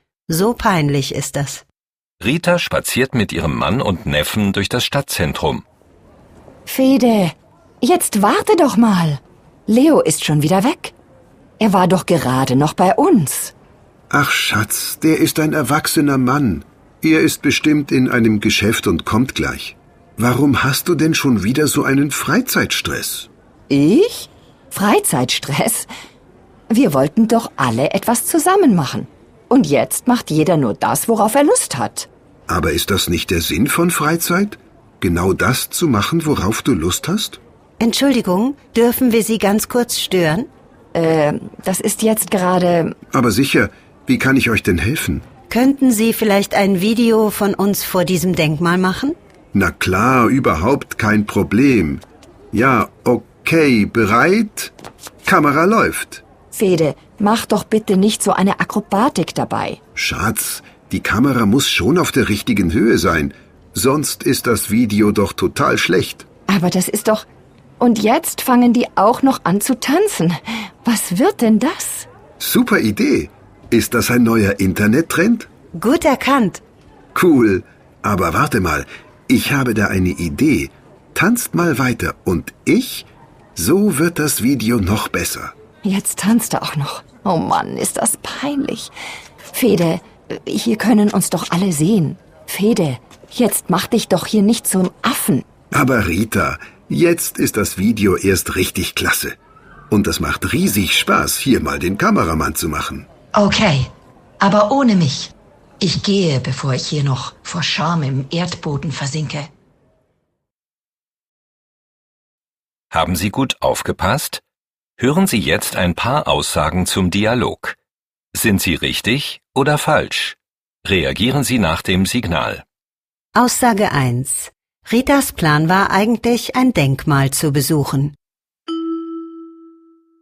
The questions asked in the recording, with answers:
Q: Ritas Plan war eigentlich, ein Denkmal zu besuchen.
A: Falsch. Eigentlich war der Plan, dass Sie, Ihr Mann Fede und Ihr Neffe Leo etwas zusammen machen.